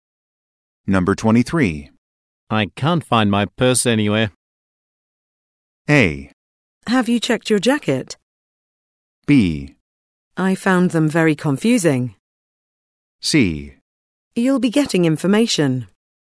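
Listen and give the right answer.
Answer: A: Have you checked your jacket?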